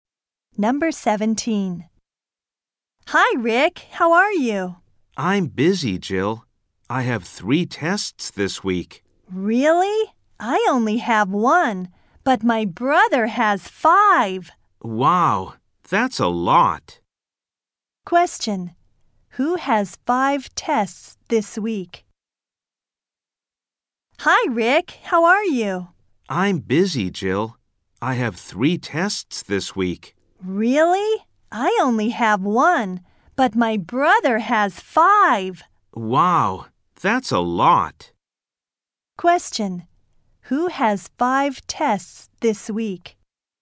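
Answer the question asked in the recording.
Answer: Jill's brother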